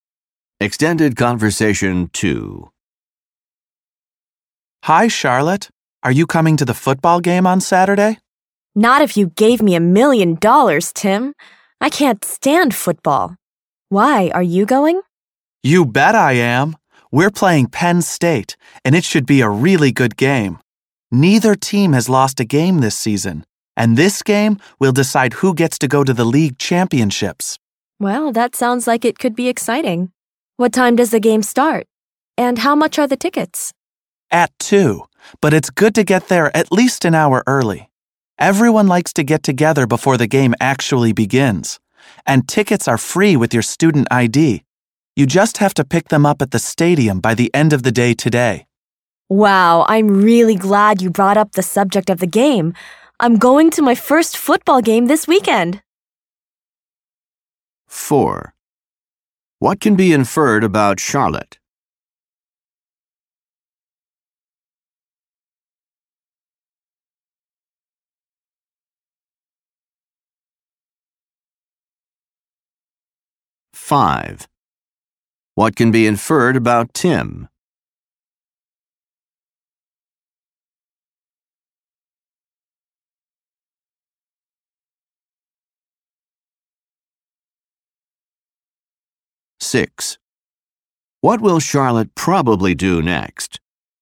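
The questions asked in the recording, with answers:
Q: What will Charlotte probably do next?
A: Pick up a free ticket at the stadium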